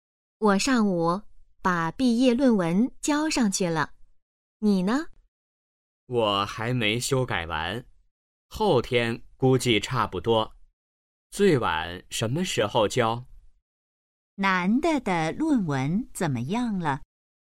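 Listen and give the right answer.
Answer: 还没修改完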